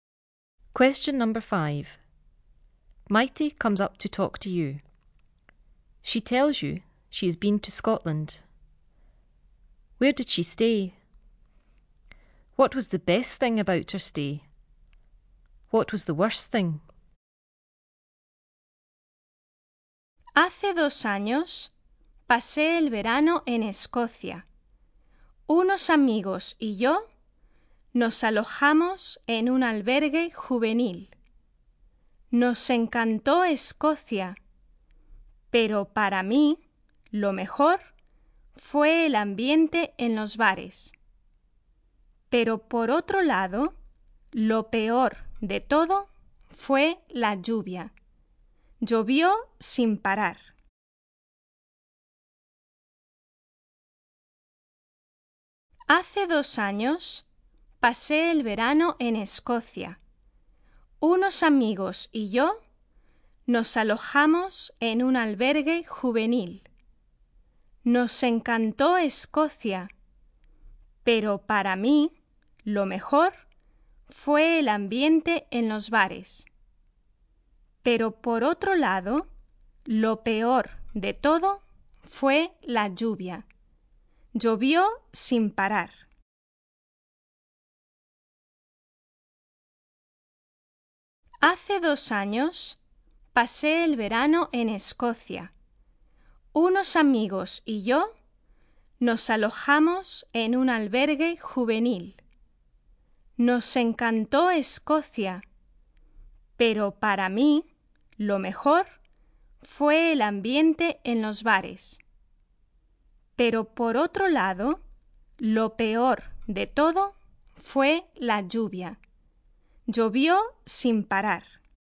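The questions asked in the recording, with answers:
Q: Where did she stay?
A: In a youth hostel

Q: What was the best thing about her stay?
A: The atmosphere in the bars

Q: What was the worst thing?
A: The rain; it rained nonstop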